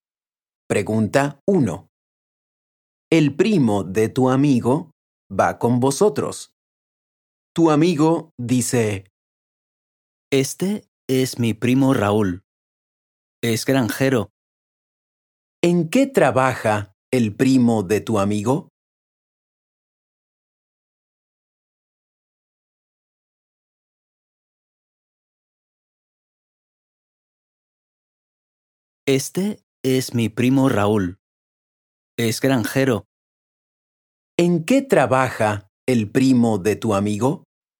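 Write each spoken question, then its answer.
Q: ¿En qué trabaja el primo de tu amigo?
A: Es granjero.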